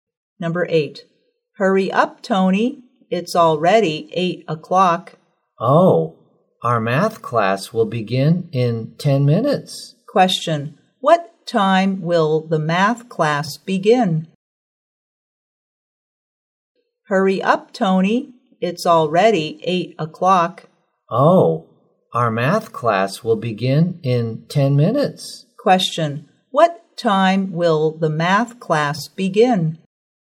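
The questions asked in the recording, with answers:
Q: What time will the math class begin?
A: At 8:10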